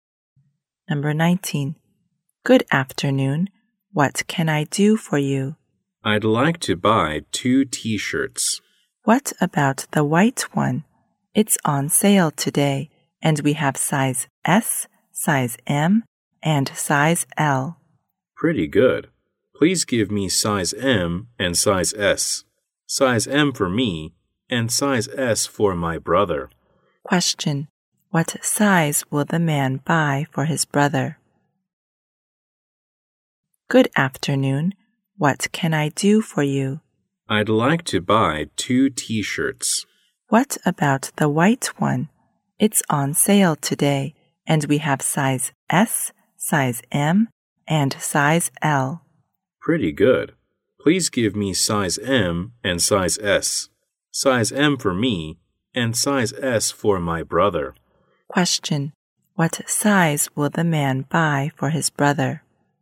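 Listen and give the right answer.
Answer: Size S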